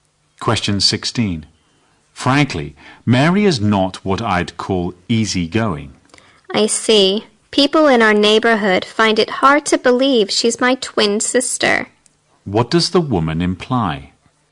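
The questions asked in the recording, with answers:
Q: What does the woman imply?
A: She and her twin sister Mary have very different personalities.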